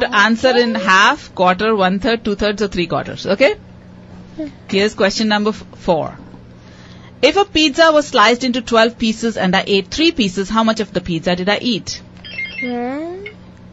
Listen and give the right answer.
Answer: A quarter of the pizza. One-fourth. A quarter of the pizza.